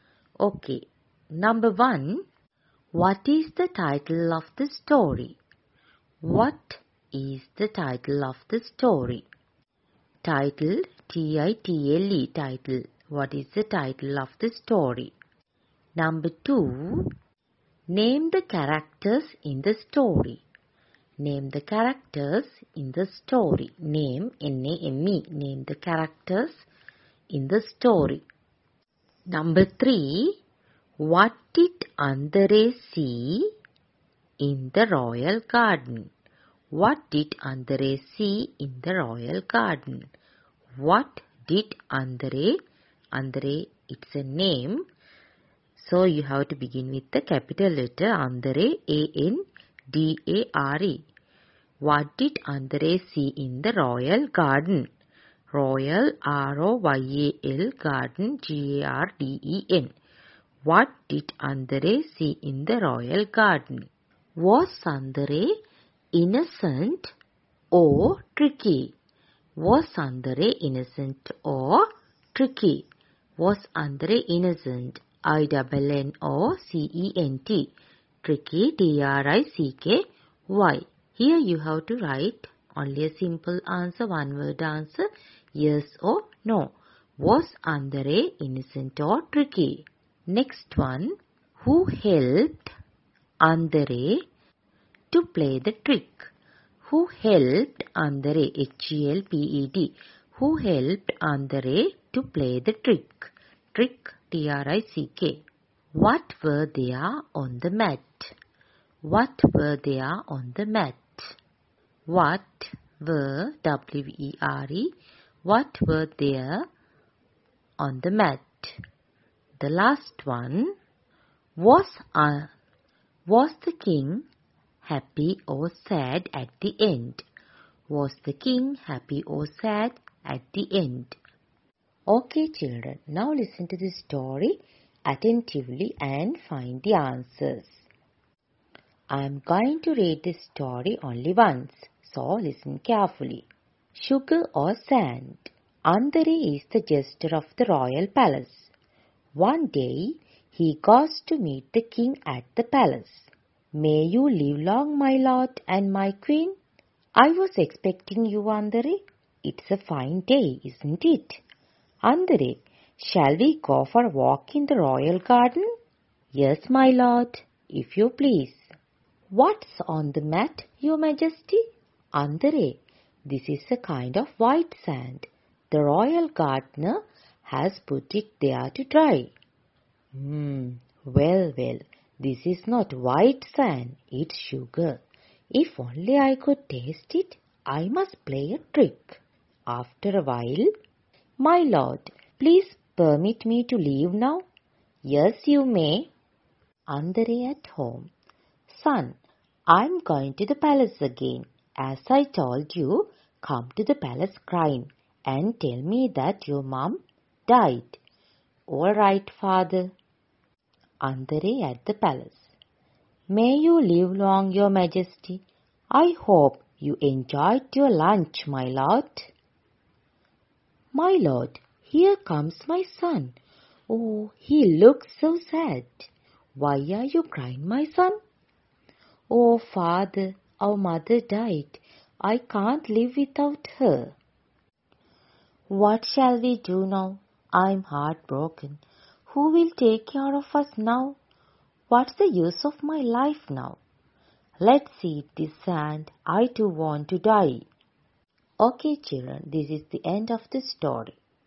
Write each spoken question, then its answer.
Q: what is the title of the story?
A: That is Sugar or Sand.

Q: name the characters in the story.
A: That is Jester.

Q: What did Andare see in the royal garden?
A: There was a mat.

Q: Was Andare innocent or tricky?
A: Andare is tricky.

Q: What were they on the mat?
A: Yes, there was sugar.